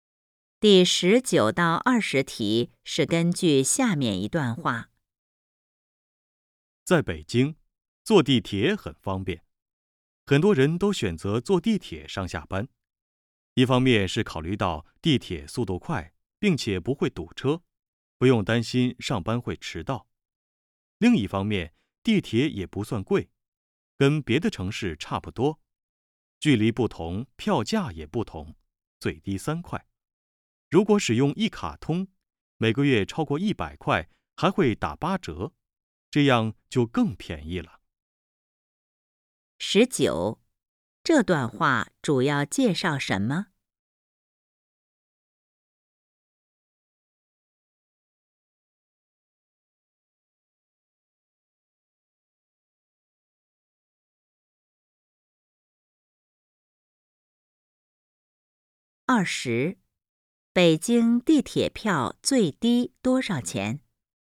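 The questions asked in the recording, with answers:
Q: 北京地铁票最低多少钱?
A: 3块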